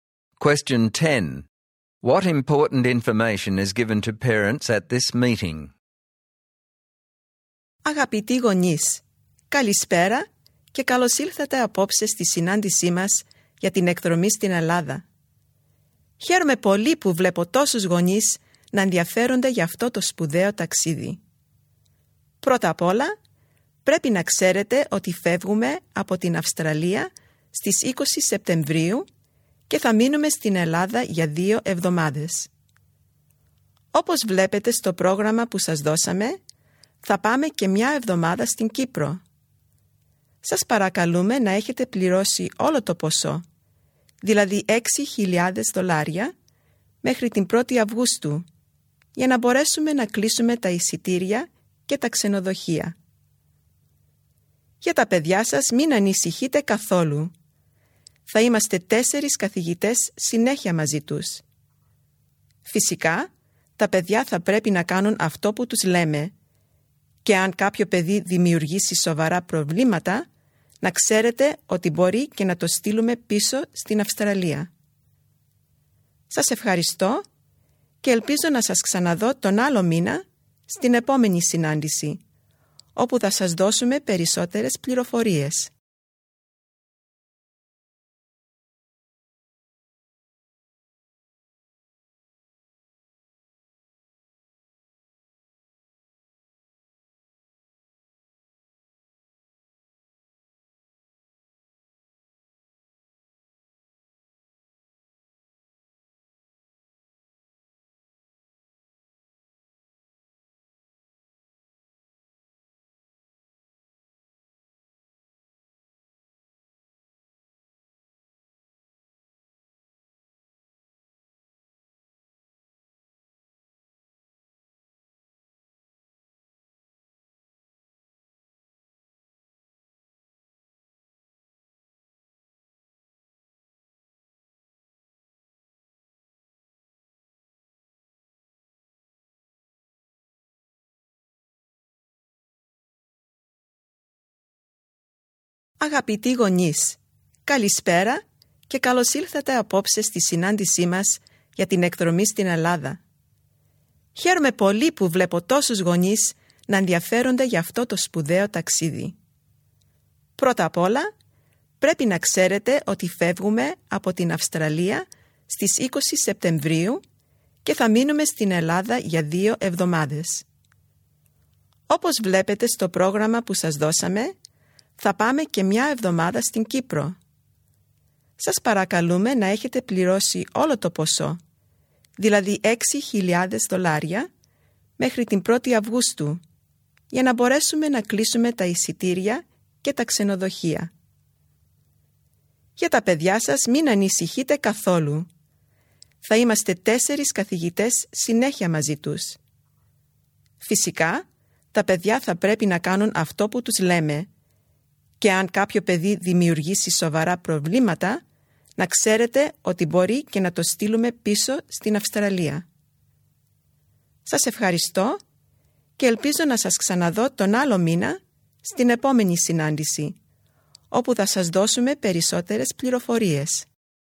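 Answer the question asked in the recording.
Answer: The group leaves on 20 September for 2 weeks in Greece and 1 week in Cyprus; the full $6,000 must be paid by 1 August; 4 teachers will supervise; badly behaved students may be sent back to Australia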